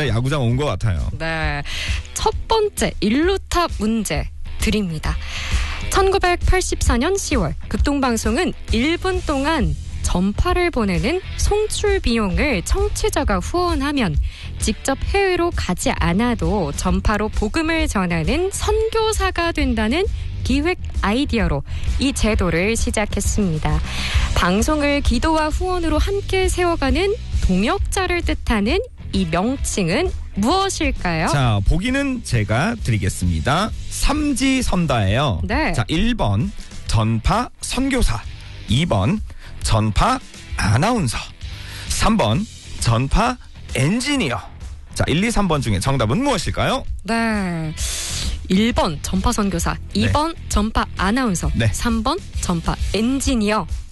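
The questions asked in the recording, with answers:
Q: 방송을 기도와 후원으로 함께 세워가는 동역자를 뜻하는 이 명칭은 무엇일까요?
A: 1번: 전파 선교사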